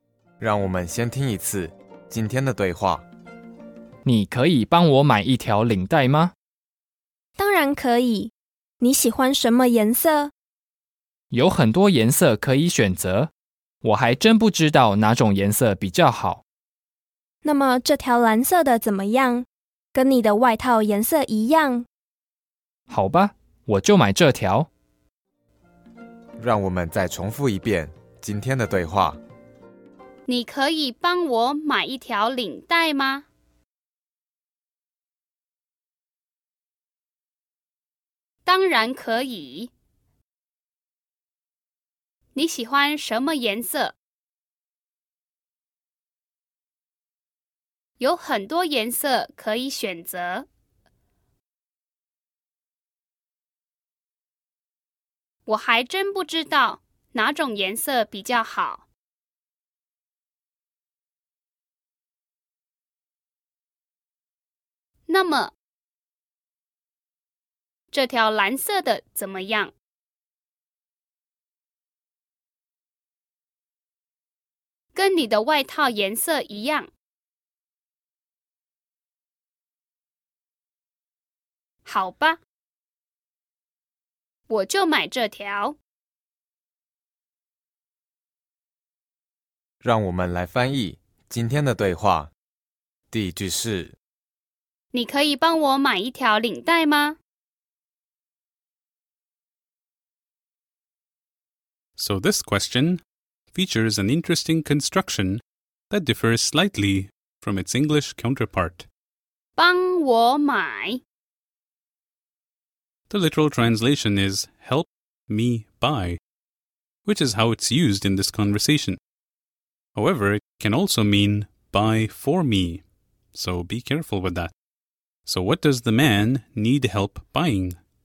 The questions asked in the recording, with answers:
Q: So what does the man need help buying?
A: 一条领带。